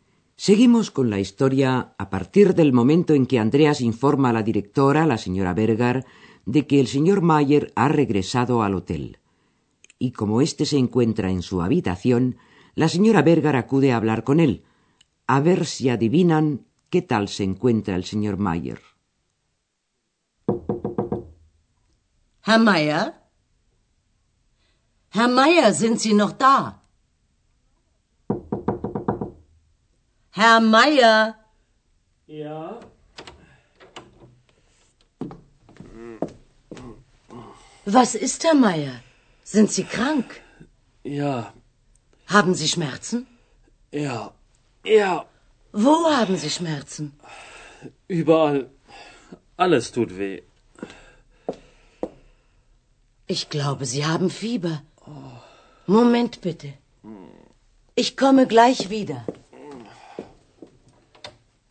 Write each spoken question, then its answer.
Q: a ver si adivinan qué tal se encuentra el señor Mayer.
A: lo que pasa es que está enfermo.